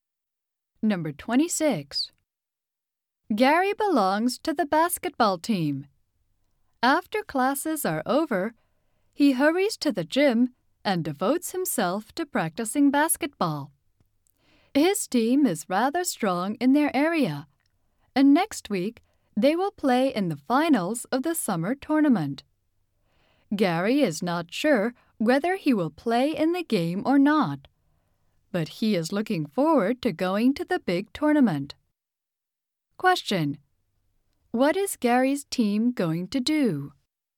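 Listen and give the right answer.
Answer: Play in the finals of the summer tournament.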